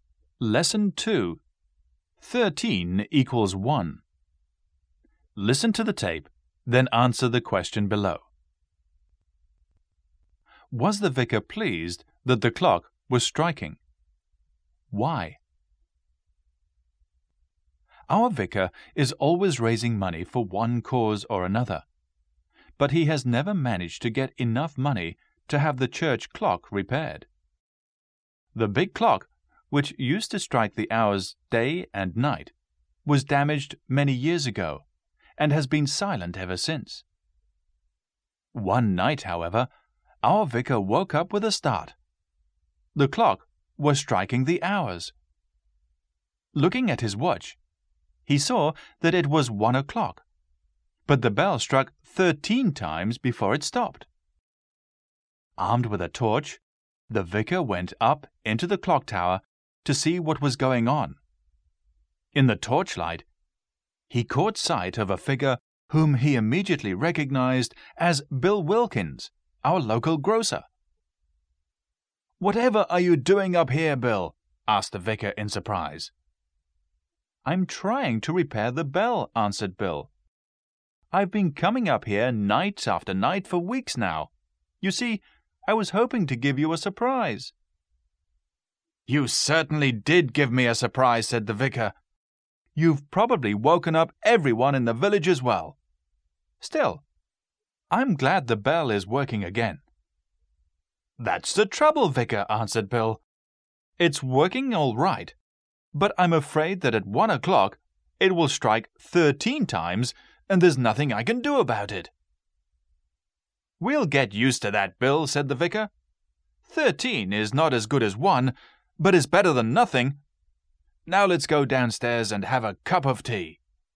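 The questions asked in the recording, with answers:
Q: Was the vicar pleased that the clock was striking?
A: Yes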